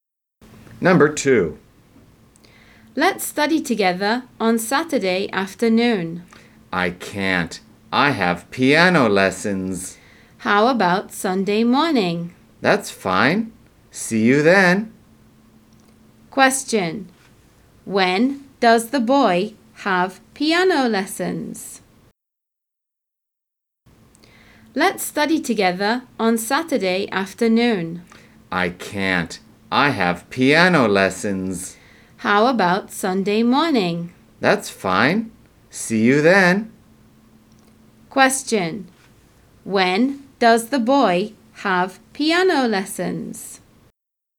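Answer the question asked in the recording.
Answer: On Saturday afternoon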